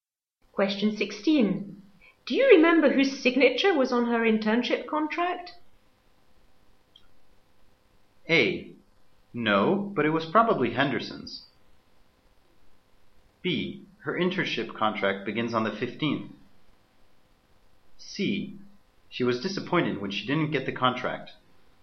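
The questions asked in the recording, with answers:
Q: Do you remember whose signature was on her internship contract?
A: A: No, but it was probably Henderson's.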